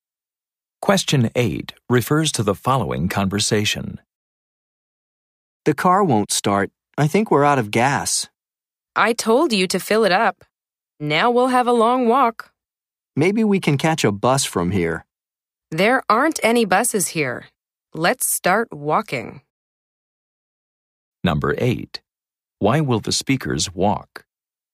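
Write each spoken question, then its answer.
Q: Why will the speakers walk?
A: The car is out of gas and there are no buses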